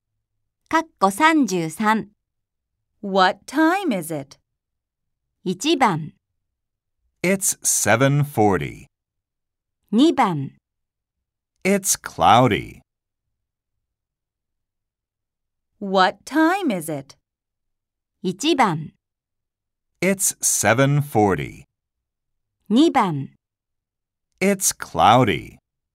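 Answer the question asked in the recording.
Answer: 1: It's 7:40.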